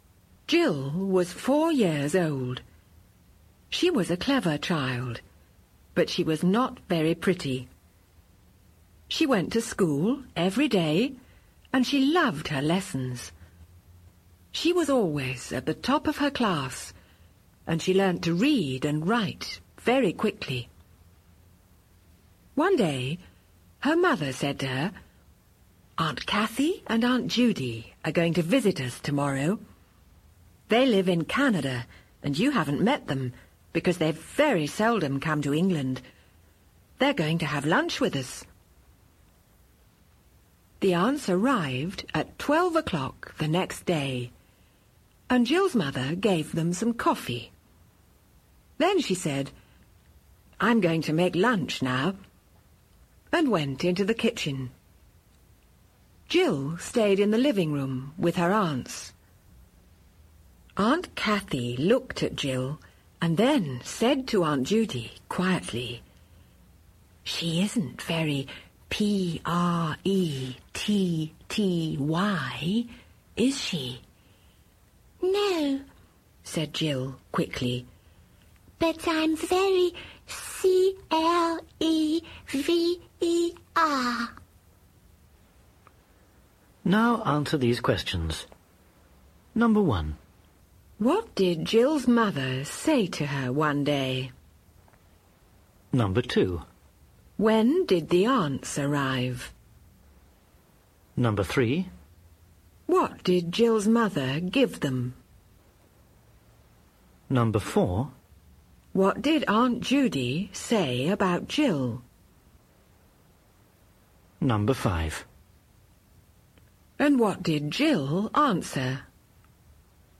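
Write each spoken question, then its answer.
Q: What did Jill's mother say to her one day?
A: That Aunt Kathy and Aunt Judy were going to visit them tomorrow and have lunch with them.

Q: When did the aunts arrive?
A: At 12 o'clock the next day.

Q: What did Jill's mother give them?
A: Some coffee.

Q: And what did Jill answer?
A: "No, but I'm very clever."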